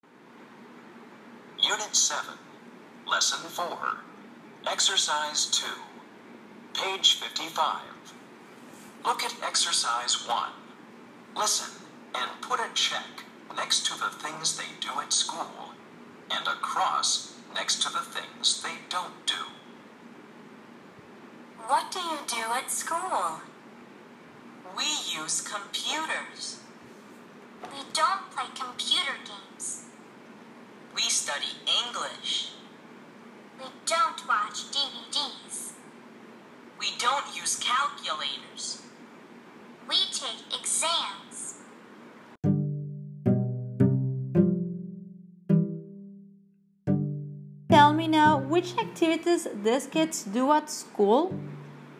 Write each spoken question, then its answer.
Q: Tell me now, which activities these kids do at school?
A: Okay, so we said use computers, study English, and